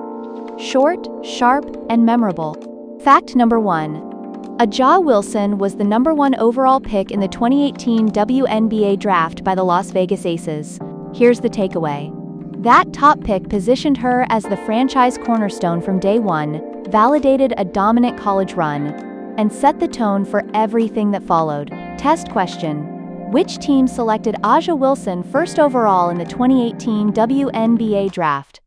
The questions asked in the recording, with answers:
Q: Which team selected Ajaja Wilson first overall in the 2018 WNBA draft?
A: Correct answer. Las Vegas Aces.